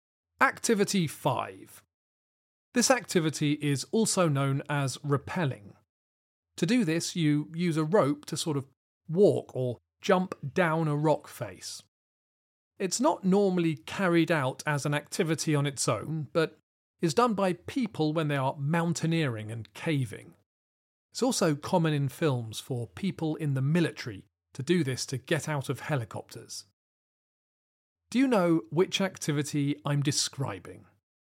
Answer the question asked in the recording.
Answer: The answer is abseiling.